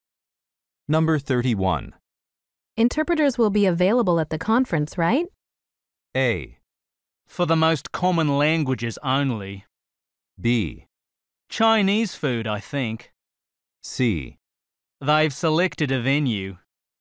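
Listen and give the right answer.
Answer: A: For the most common languages only.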